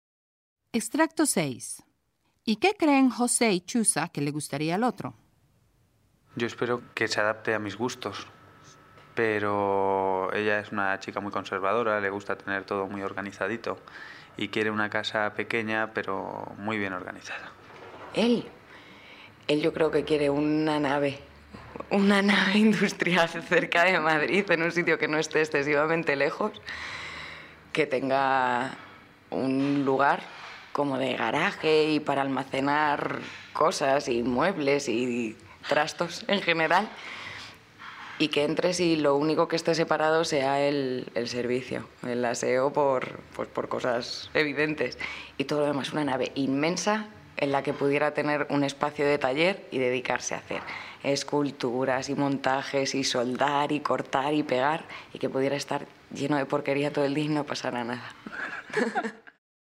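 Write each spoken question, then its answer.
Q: ¿Y qué creen José y Chusa que le gustaría al otro?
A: Él cree que ella quiere una casa pequeña pero muy bien organizada; ella cree que él quiere una nave industrial cerca de Madrid con taller y garaje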